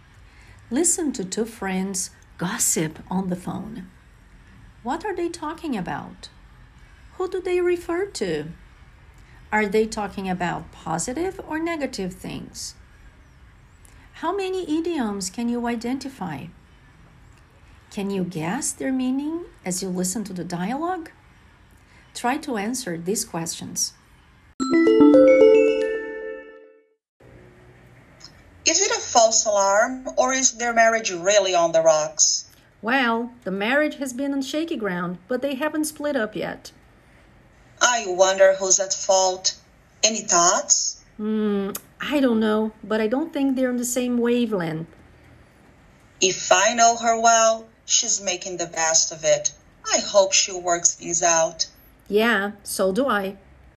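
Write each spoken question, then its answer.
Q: What are they talking about?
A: A couple's troubled marriage

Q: Are they talking about positive or negative things?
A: Negative things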